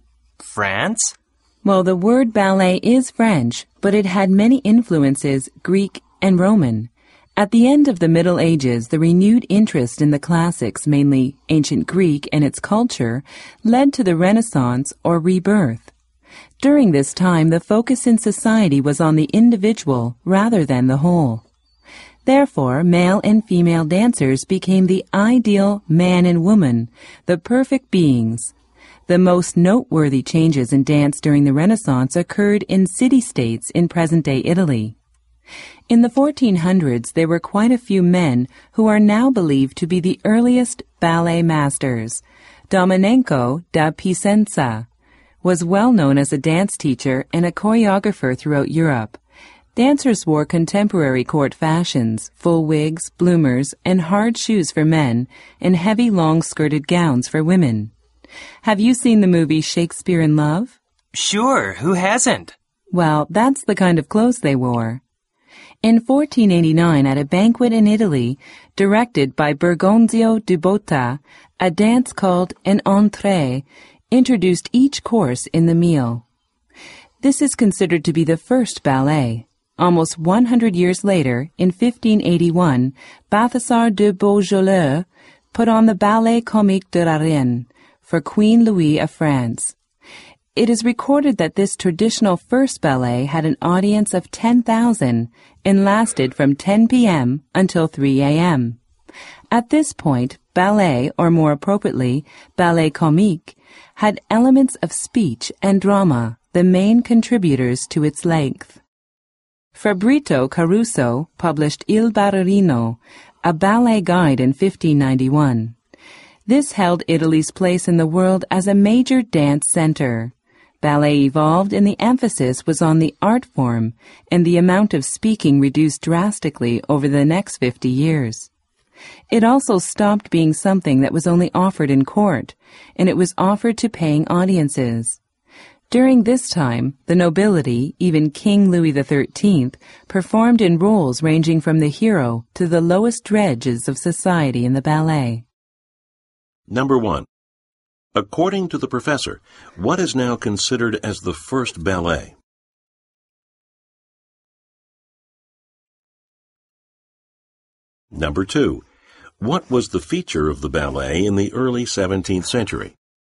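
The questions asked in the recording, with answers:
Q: According to the professor, what is now considered as the first ballet?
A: The dances (entrées) introducing each course at a 1489 banquet in Italy directed by Bergonzio di Botta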